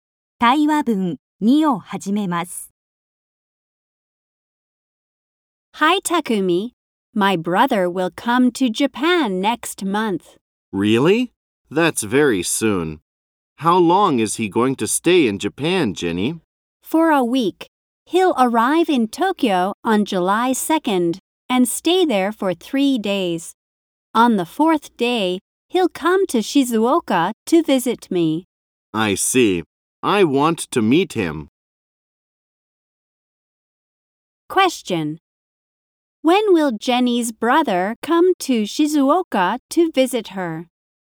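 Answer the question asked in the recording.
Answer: On July 5th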